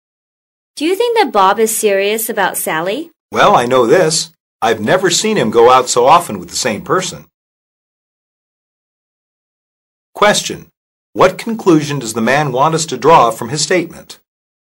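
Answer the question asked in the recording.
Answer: That Bob is serious about Sally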